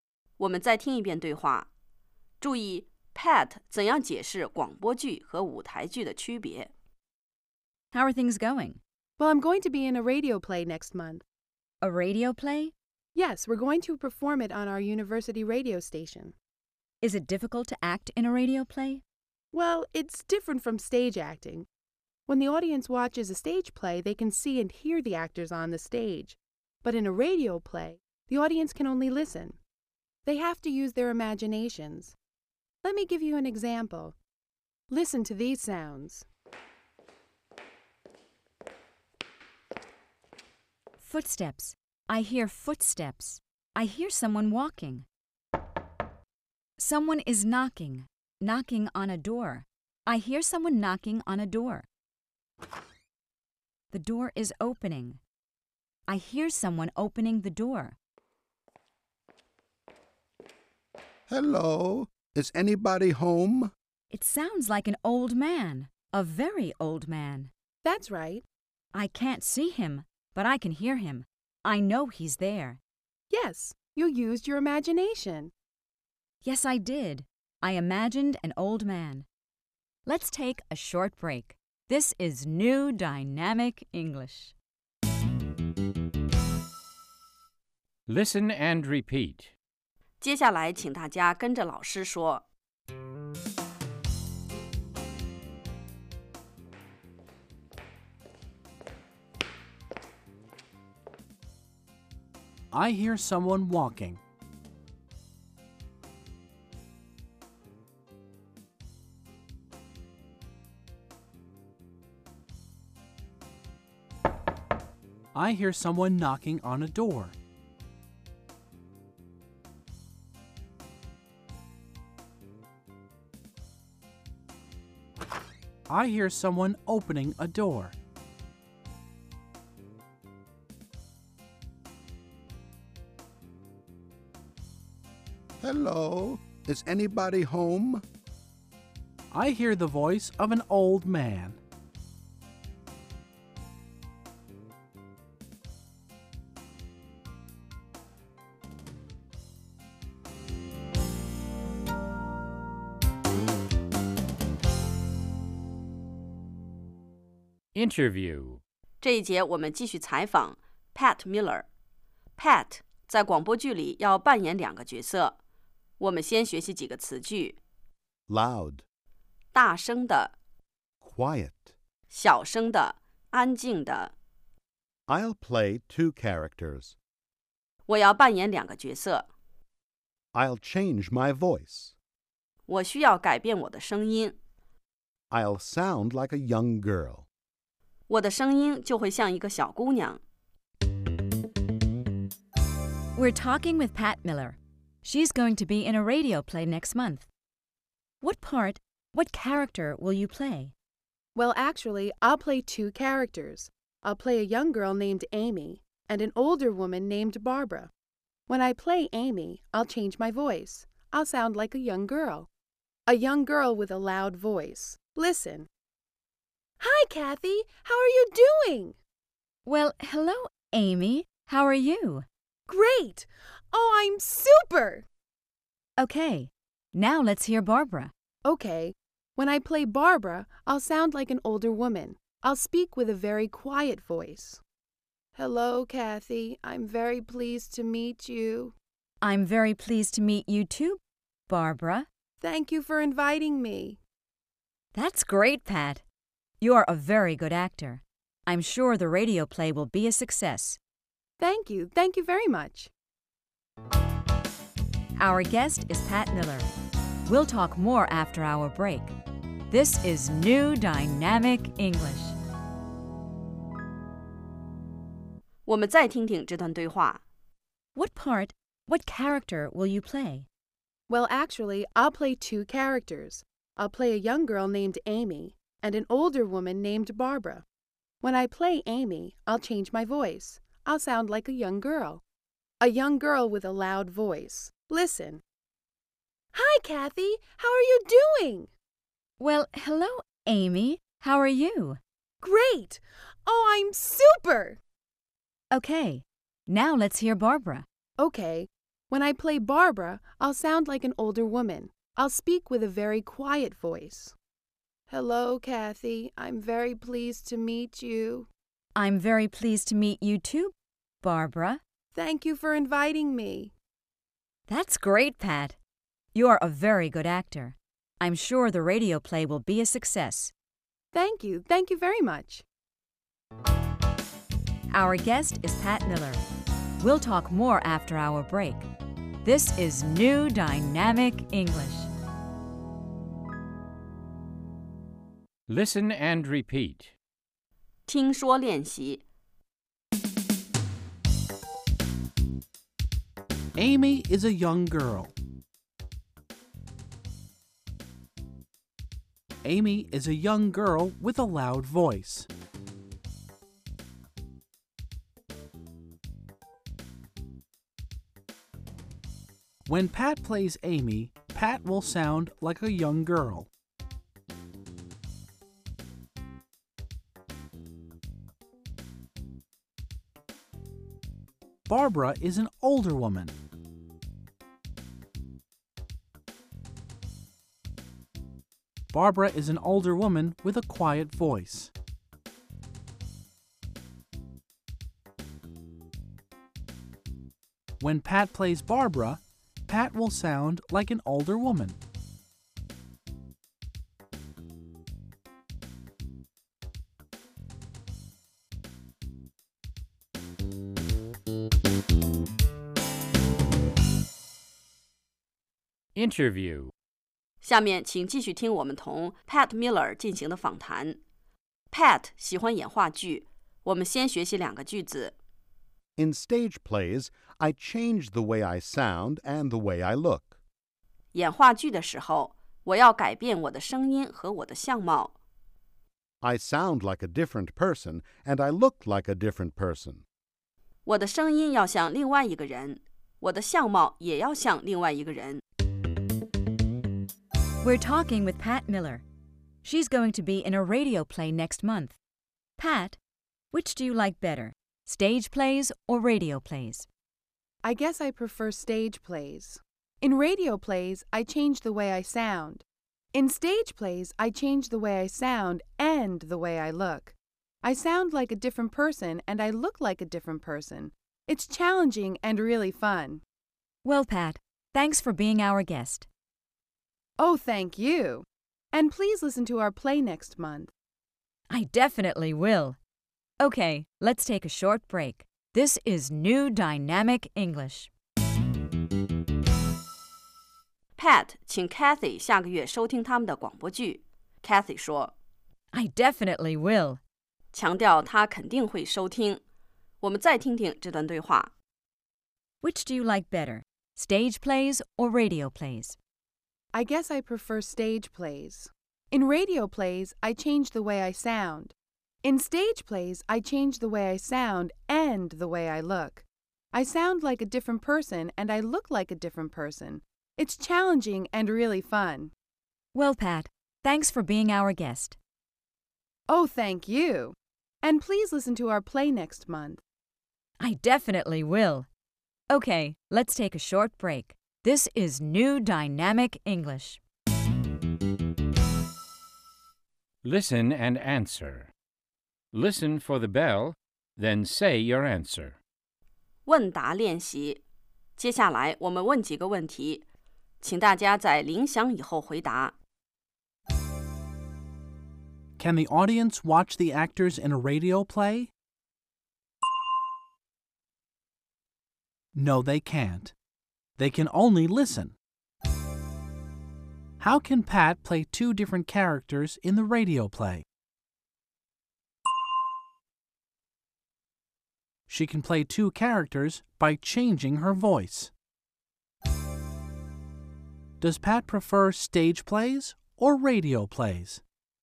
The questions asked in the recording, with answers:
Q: Can the audience watch the actors in a radio play?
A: No, they can't.They can only listen.

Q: Does Pat prefer stage plays or radio plays?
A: She prefers stage plays.